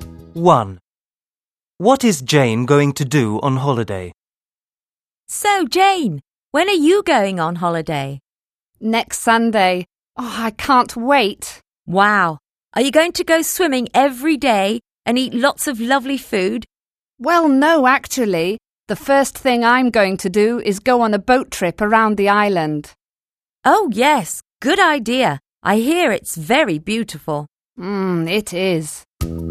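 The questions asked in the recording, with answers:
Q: What is Jane going to do on holiday?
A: Go on a boat trip around the island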